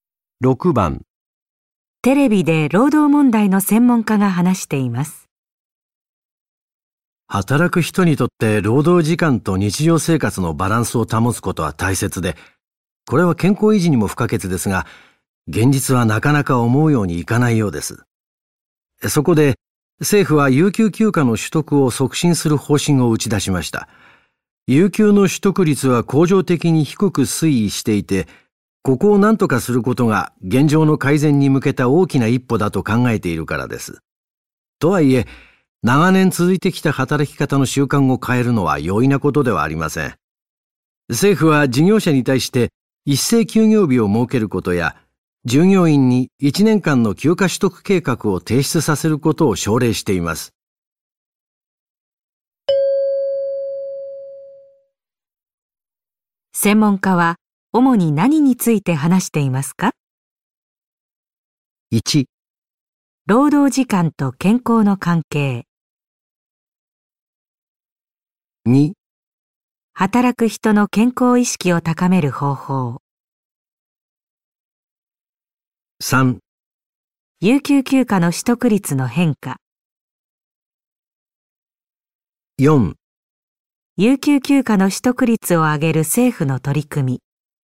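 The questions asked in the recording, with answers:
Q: 専門家は主に何について話していますか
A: 4: 有給休暇の取得率を上げる政府の取り組み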